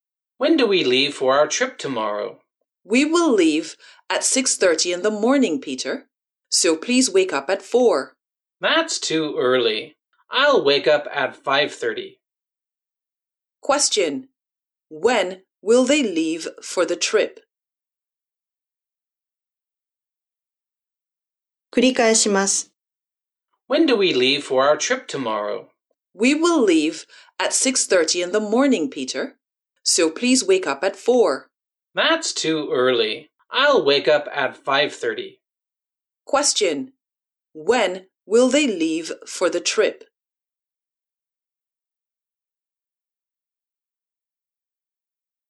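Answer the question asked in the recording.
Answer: At 6:30 in the morning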